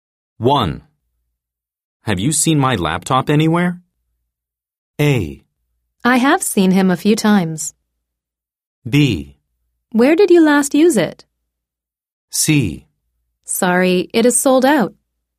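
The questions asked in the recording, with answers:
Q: Have you seen my laptop anywhere?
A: B: Where did you last use it?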